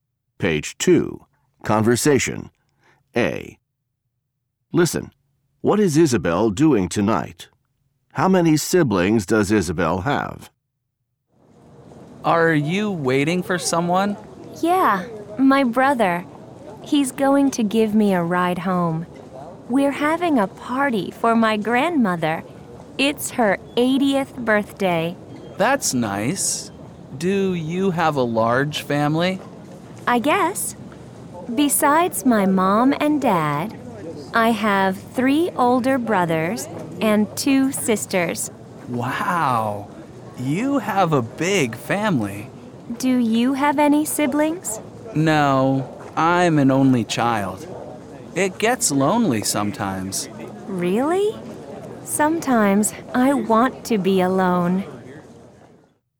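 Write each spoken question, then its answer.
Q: What is Isabel doing tonight?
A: Having a party for her grandmother's 80th birthday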